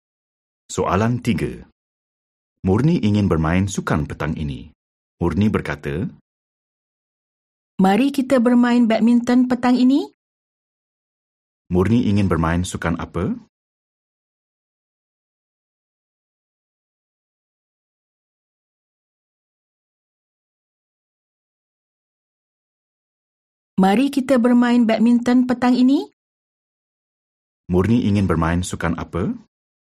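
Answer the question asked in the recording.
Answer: badminton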